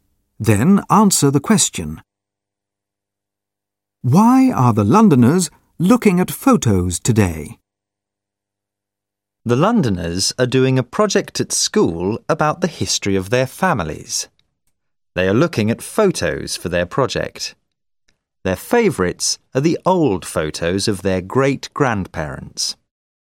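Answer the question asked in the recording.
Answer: For their school project about the history of their families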